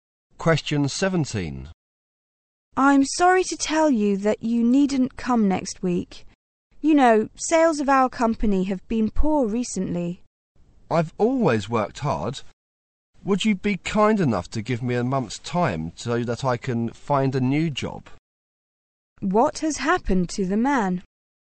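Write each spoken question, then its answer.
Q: What has happened to the man?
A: He has been dismissed from his job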